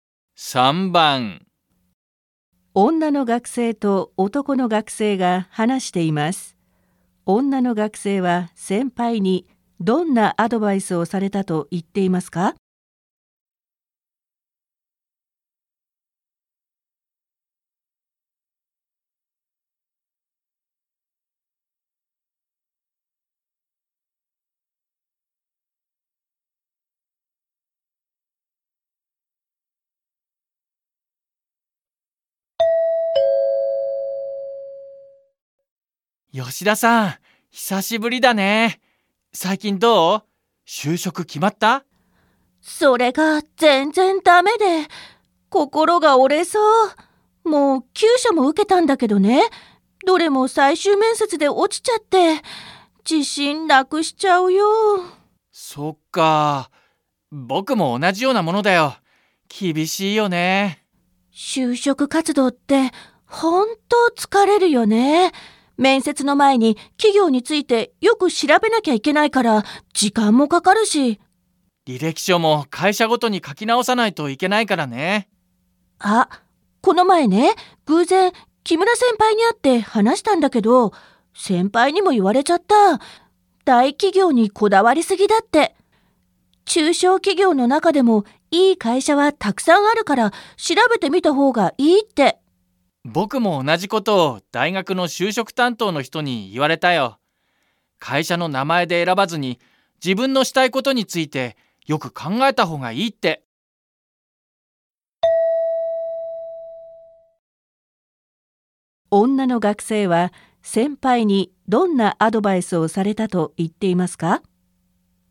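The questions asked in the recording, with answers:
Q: 女の学生は先輩にどんなアドバイスをされたと言っていますか?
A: 大企業にこだわりすぎず、中小企業のいい会社も調べてみた方がいい

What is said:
女の学生と男の学生が話しています。女の学生は先輩にどんなアドバイスをされたと言っていますか。
M 吉田さん、久しぶりだね。最近どう?就職、決まった?/ Yoshida à, lâu rồi mới gặp.
F それが全然だめで。心が折れそう。もう9社も受けたんだけどね。どれも最終面接で落ちちゃって。自信なくしちゃうよ。
M そっかあ。僕も同じようなものだよ。厳しいよね。/ Vậy à? Tớ cũng giống cậu. Tìm việc khó khăn nhỉ.
F 就職活動って、本当疲れるよね。面接の前に企業についてよく調べなきゃいけないから時間もかかるし。
M 履歴書も会社ごとに書き直さないといけないからね。
F あ、この前ね、偶然、木村先輩に会って話たんだけど。先輩にも言われちゃった。大企業にこだわりすぎだって。中小企業の中でもいい会社はたくさんあるから、調べてみた方がいいって。
M 僕も同じっことを大学の就職担当の人に言われたよ。会社の名前で選ばずに、自分のしたいことについてよく考えた方がいいって。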